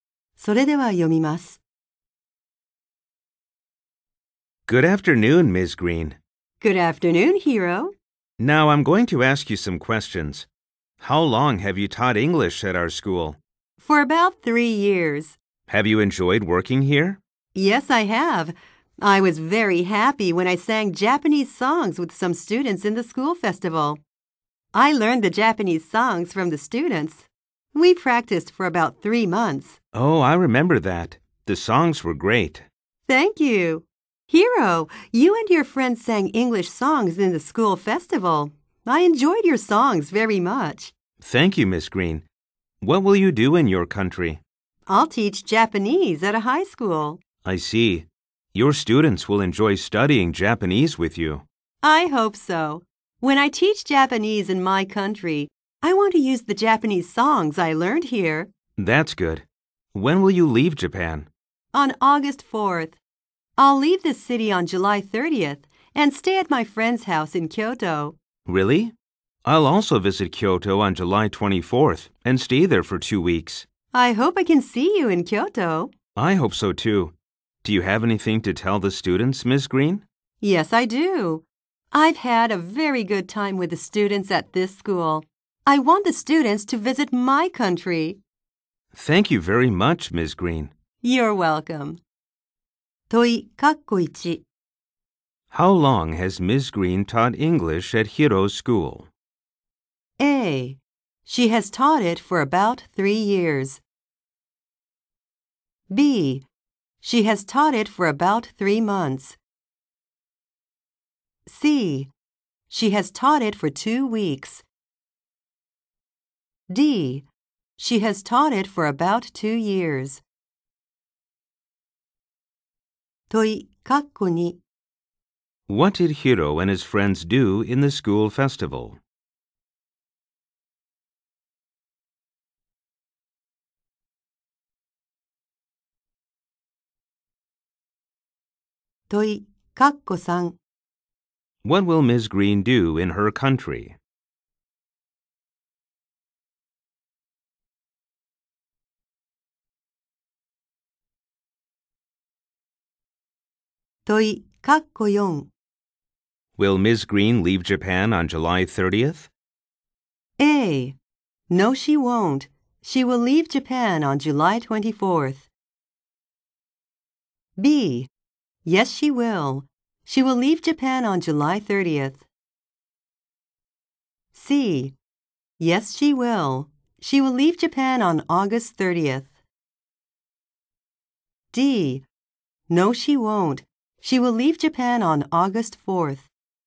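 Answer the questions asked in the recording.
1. A: She has taught it for about 3 years.
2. They sang English songs.
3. She will teach Japanese at a high school.
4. D: No, she won't. She will leave Japan on August 4th.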